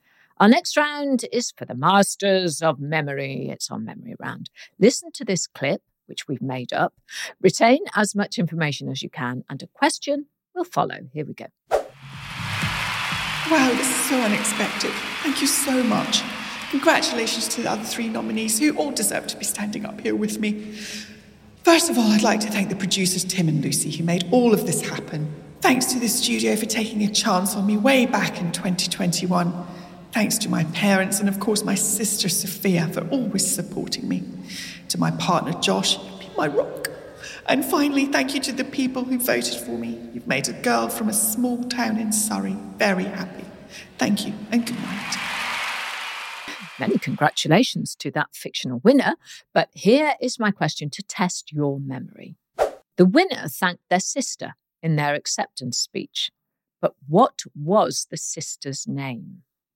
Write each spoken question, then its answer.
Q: The winner thanked their sister in their acceptance speech, but what was the sister's name?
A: And the answer was Sophia.